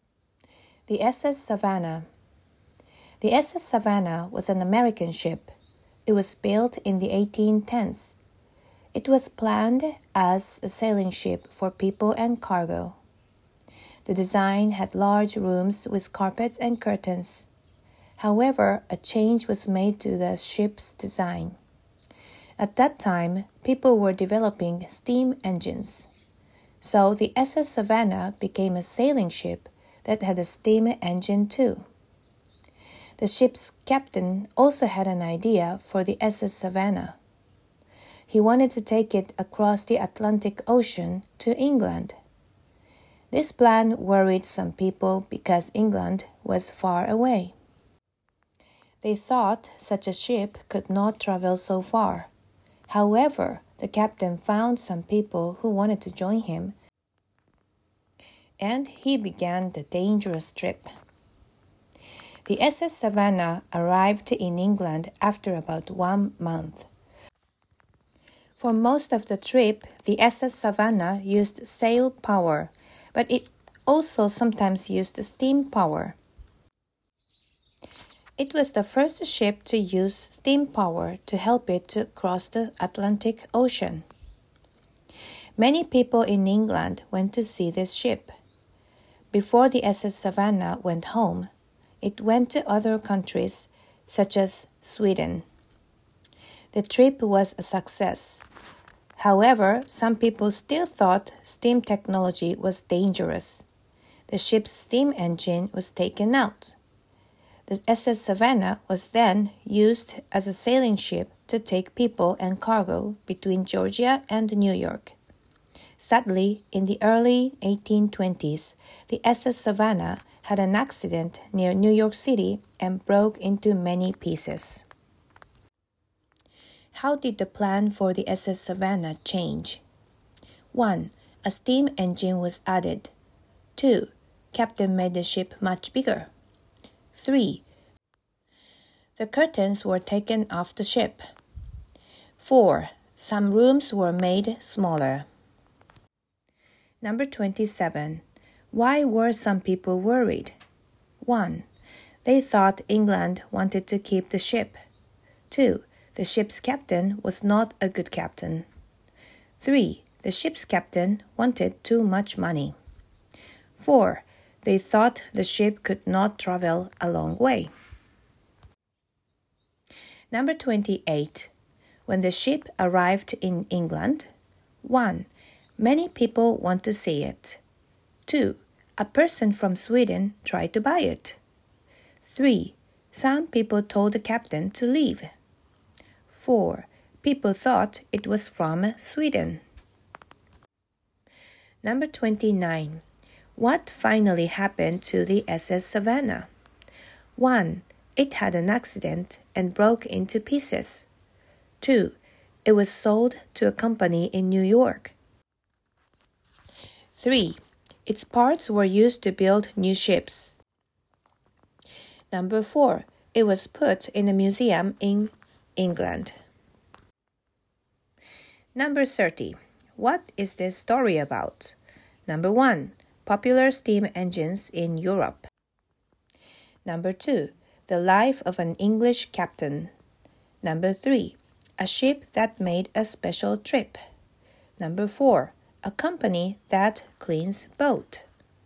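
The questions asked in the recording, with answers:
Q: How did the plan for the SS Savannah change?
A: 1: A steam engine was added.

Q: Why were some people worried?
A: 4: They thought the ship could not travel a long way.

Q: When the ship arrived in England, 1.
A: 1: Many people want to see it.

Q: What finally happened to the SS Savannah?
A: 1: It had an accident and broke into pieces.

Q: What is this story about?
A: 3: A ship that made a special trip.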